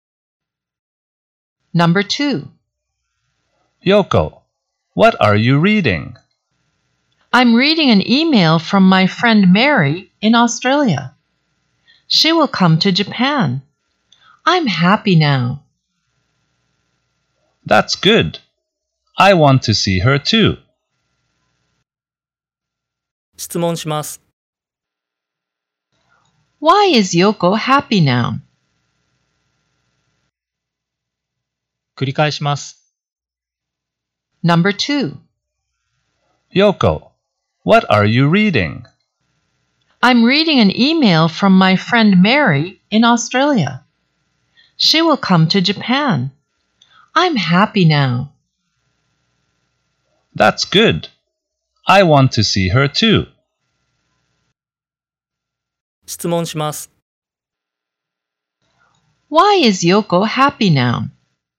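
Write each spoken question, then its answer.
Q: Why is Yoko happy now?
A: Because her friend Mary will come to Japan.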